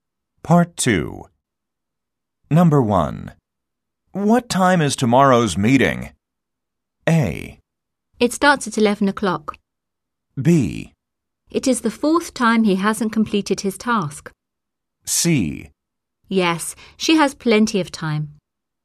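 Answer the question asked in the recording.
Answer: A: It starts at 11 o'clock.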